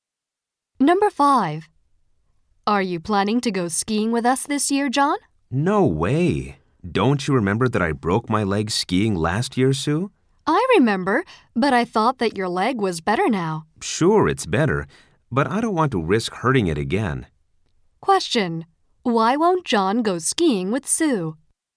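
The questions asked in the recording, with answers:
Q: Why won't John go skiing with Sue?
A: He doesn't want to risk hurting his leg again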